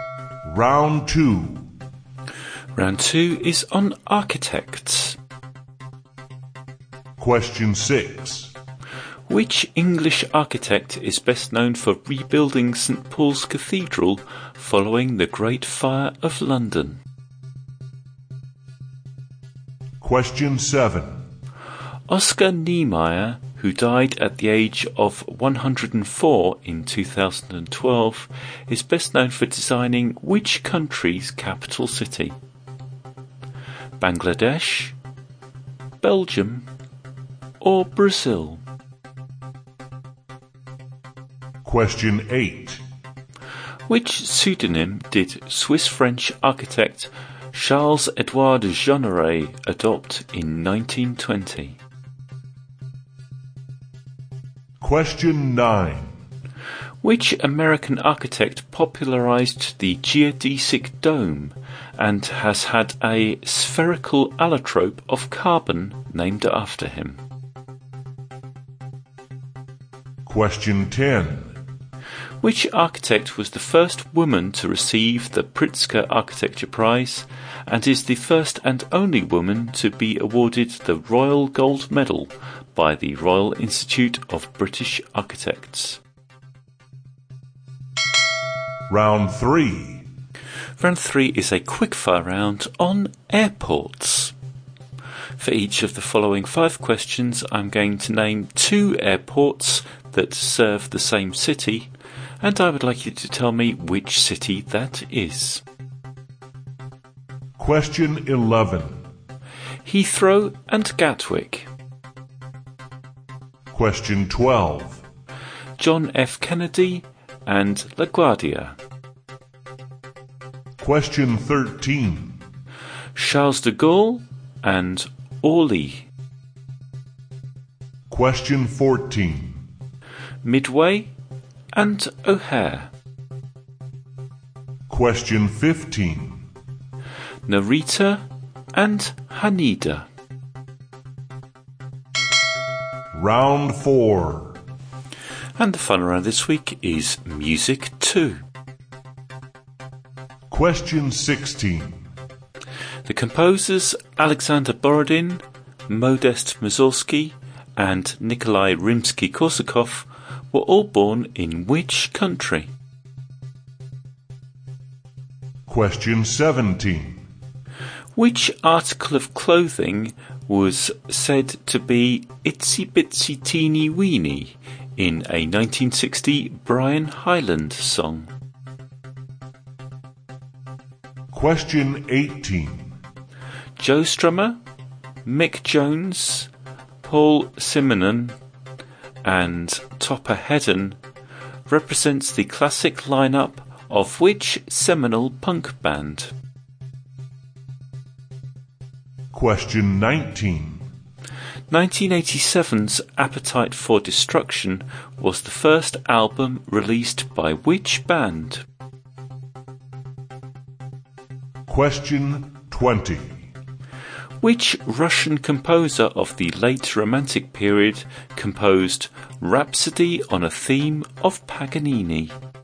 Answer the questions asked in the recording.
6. Paul's Cathedral, was Sir Christopher Wren.
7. Number seven, Oscar Niemeyer designed the capital of Brazil.
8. Number eight, Charles-Edouard Jeanneret is better known as Le Corbusier.
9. Number nine, the American architect who popularized the geodesic dome was Buckminster Fuller.
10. And number 10, the first woman to win the Pritzker Architecture Prize was Zaha Hadid.
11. Round 3 was on airports, and the answer to number 11, Heathrow and Gatwick are London.
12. Number 12, John F. Kennedy and LaGuardia are New York.
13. Number 13, Charles de Gaulle and Orly are Paris.
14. Number 14, Midway and O'Hare are Chicago.
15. And number 15, Narita and Haneda are Tokyo.
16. The fun around was music too, and the answers to number 16, Alexander Borodin, Modest Mussorgsky and Nikolai Rimsky-Korsakov were all born in Russia.
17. Number 17, it was an itsy bitsy teeny weeny bikini.
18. Number 18, Joe Strummer, Mick Jones, Paul Simonon and Topper Hedden were the classic lineup of The Clash.
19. Number 19, Appetite for Destruction was the first album by Guns N' Roses.
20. And number 20, Rhapsody on a Theme of Paganini was composed by Sergei Rachmaninoff.